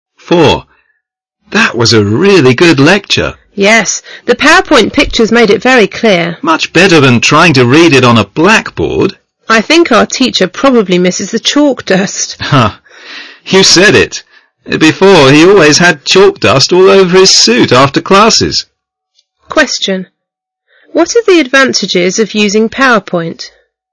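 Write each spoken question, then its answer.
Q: What are the advantages of using PowerPoint?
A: Its pictures make the lecture very clear, much clearer than reading it on a blackboard.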